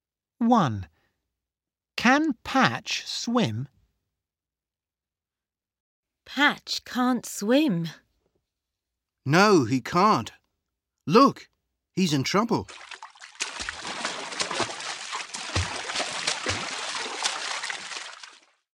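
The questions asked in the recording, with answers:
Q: Can Patch swim?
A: No, he can't.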